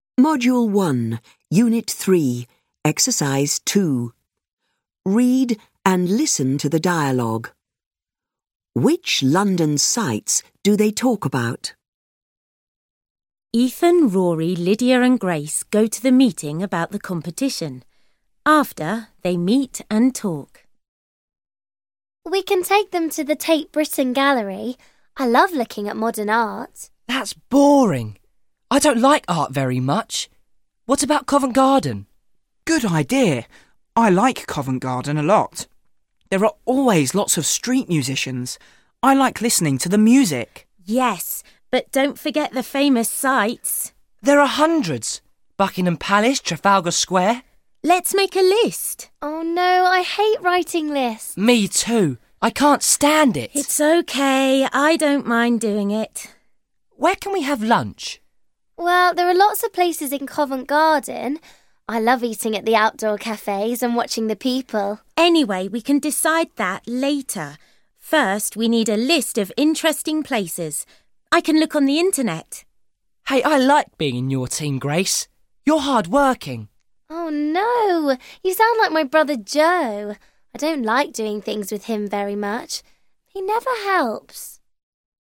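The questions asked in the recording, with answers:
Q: Which London sights do they talk about?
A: Tate Britain Gallery, Covent Garden, Buckingham Palace, Trafalgar Square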